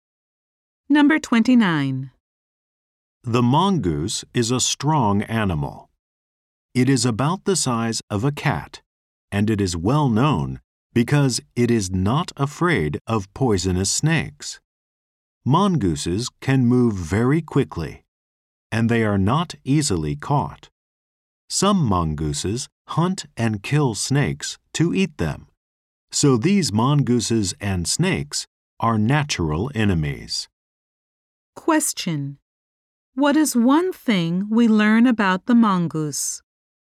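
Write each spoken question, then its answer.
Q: Question: What is one thing we learn about the mongoose?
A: It is not afraid of poisonous snakes.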